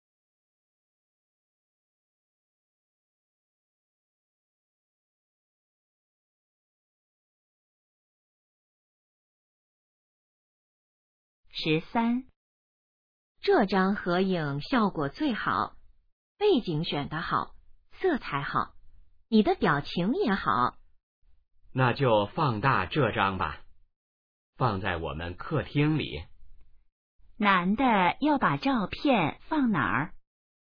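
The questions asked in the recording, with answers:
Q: 男的要把照片放哪儿?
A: 客厅里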